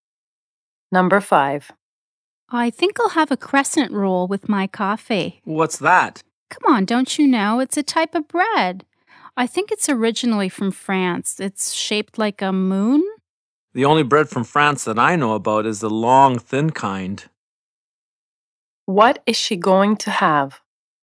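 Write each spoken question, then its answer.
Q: What is she going to have?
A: A crescent roll (croissant) with coffee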